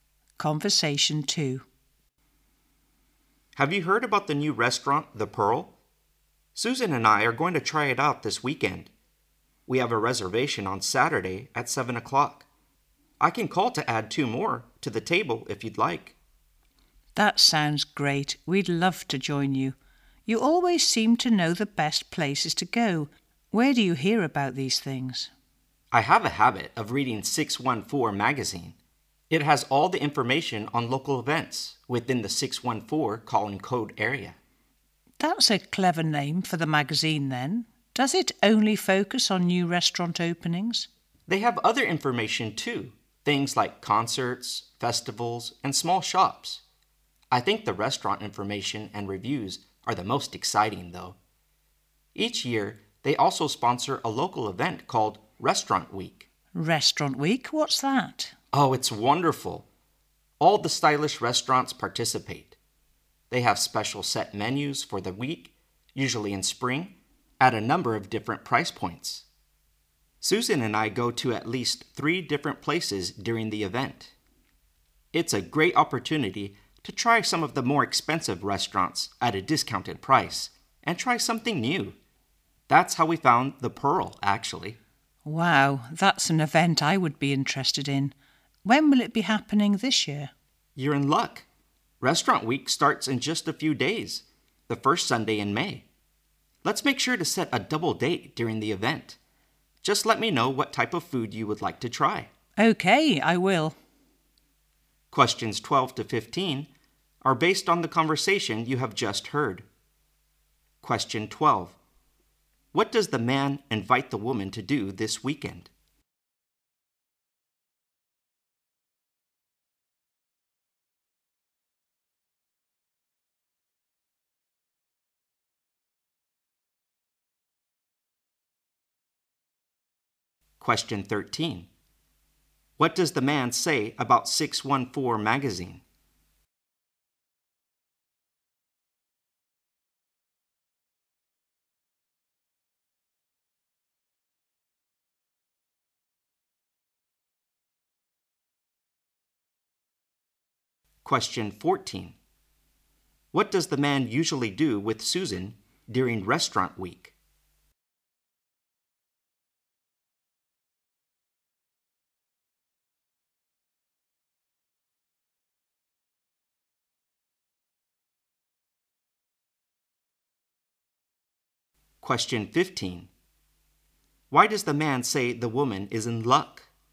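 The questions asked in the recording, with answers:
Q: What does the man invite the woman to do this weekend?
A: Join him and Susan for dinner at the new restaurant, The Pearl.

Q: What does the man say about 614 magazine?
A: It has information on local events in the 614 area.

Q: What does the man usually do with Susan during Restaurant Week?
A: They go to at least three different restaurants.

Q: Why does the man say the woman is in luck?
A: Restaurant Week starts in just a few days.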